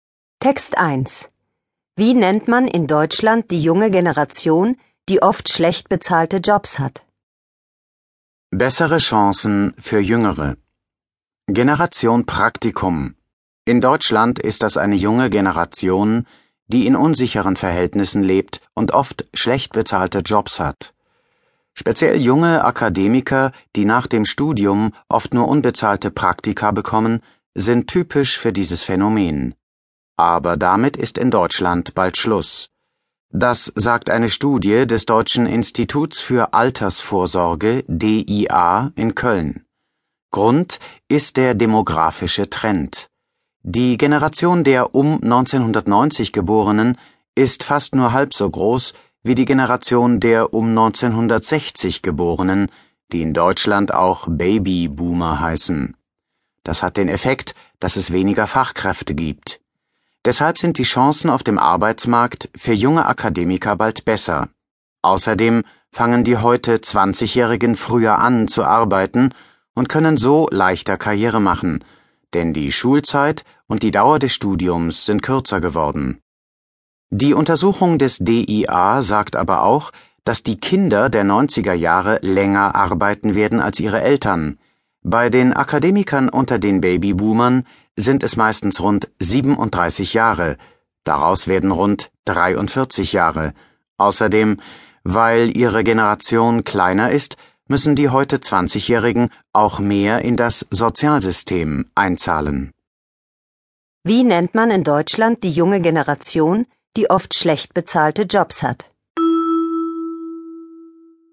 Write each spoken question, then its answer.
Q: Wie nennt man in Deutschland die junge Generation, die oft schlecht bezahlte Jobs hat?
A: Man nennt sie Generation Praktikum.